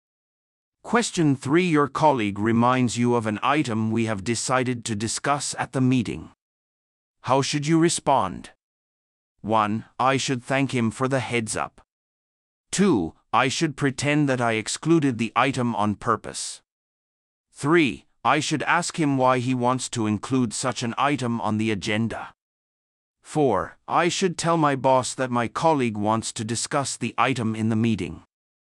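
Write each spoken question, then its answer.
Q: How should you respond?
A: 1: I should thank him for the heads up.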